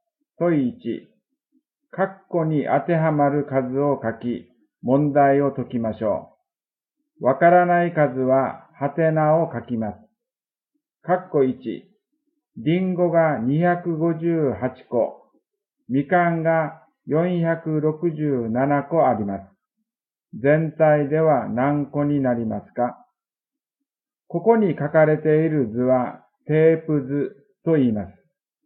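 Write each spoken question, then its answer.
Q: カッコ1、リンゴが258個、みかんが467個あります。 全体では何個になりますか?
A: 725個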